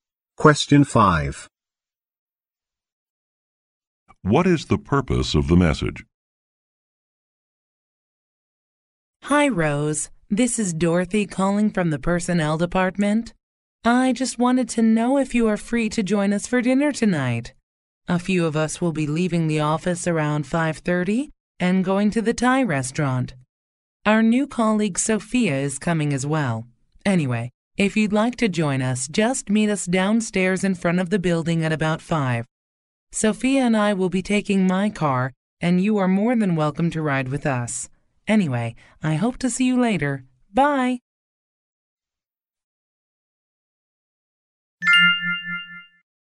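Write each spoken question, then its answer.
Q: What is the purpose of the message?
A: To invite Rose to dinner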